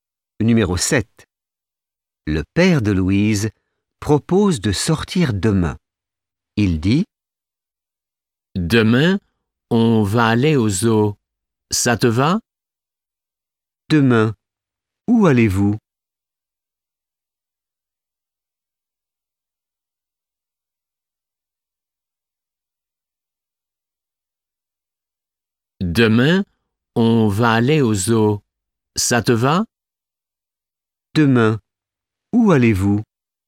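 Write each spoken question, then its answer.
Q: Demain, où allez-vous ?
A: Au zoo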